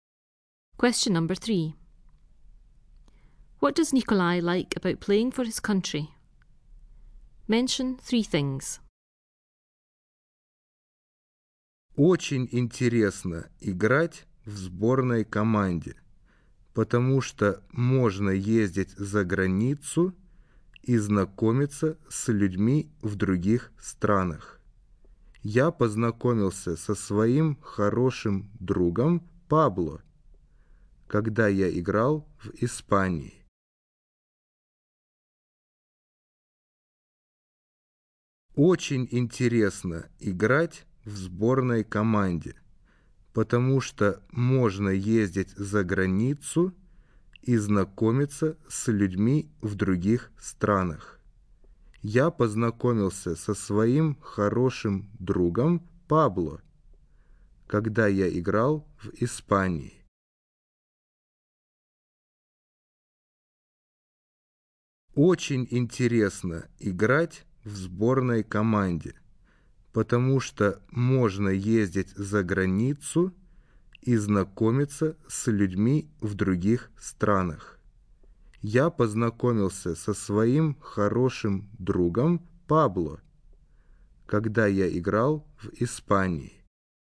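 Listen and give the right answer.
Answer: Travelling abroad, meeting people in other countries, he met his good friend Pablo in Spain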